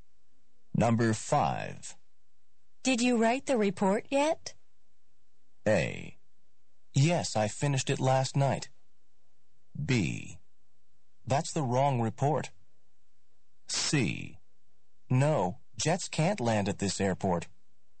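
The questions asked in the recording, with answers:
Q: Did you write the report yet?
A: A: Yes, I finished it last night.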